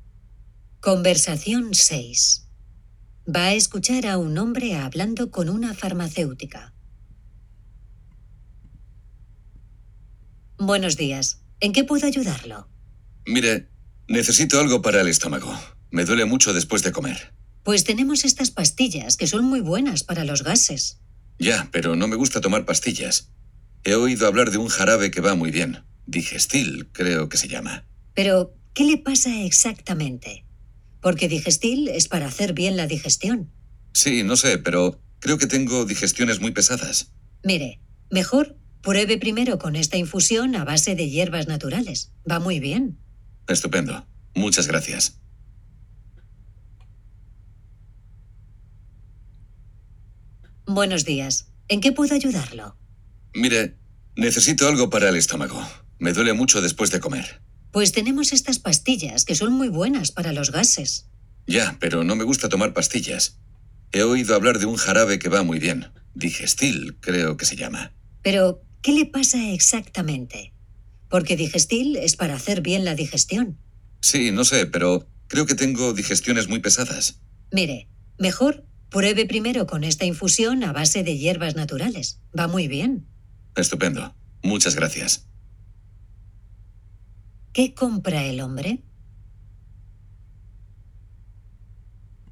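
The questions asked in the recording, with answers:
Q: ¿Qué compra el hombre?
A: Una infusión de hierbas naturales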